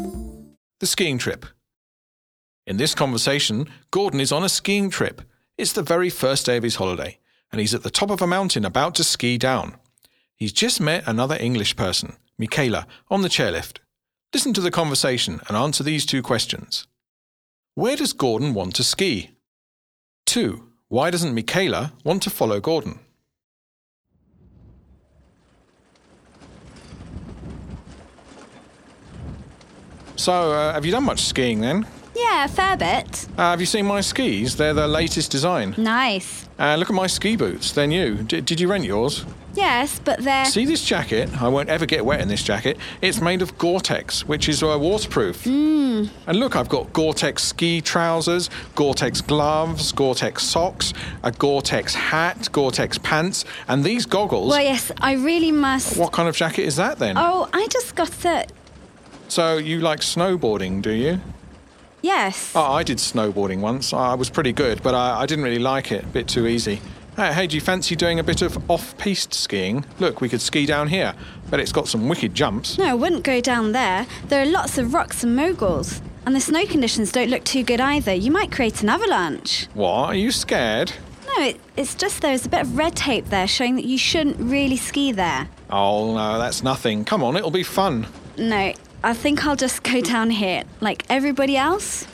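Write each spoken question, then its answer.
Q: Where does Gordon want to ski?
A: Off-piste, down a dangerous slope that has rocks, moguls and red tape

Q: Why doesn't Michaela want to follow Gordon?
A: It's dangerous: there are rocks and moguls, the snow is poor, there could be an avalanche, and red tape shows you shouldn't ski there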